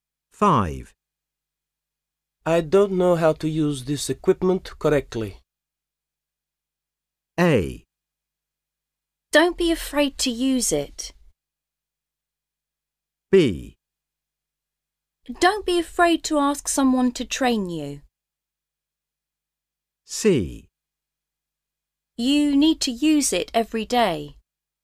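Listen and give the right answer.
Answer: B: Don't be afraid to ask someone to train you.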